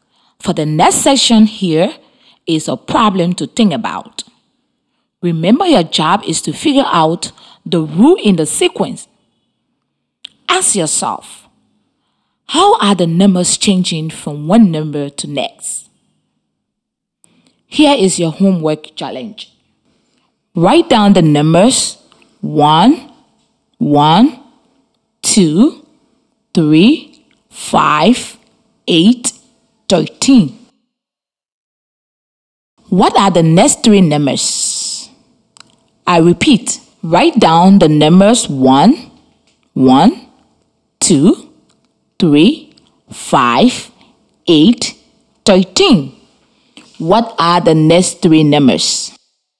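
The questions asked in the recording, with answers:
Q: What are the next three numbers?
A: 21, 34, 55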